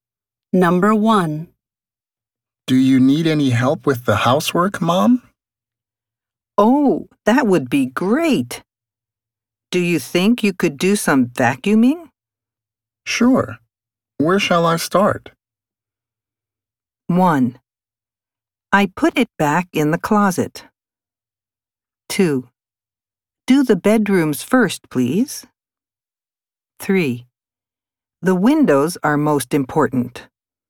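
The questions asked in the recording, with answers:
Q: Sure. Where shall I start?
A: 2: Do the bedrooms first, please.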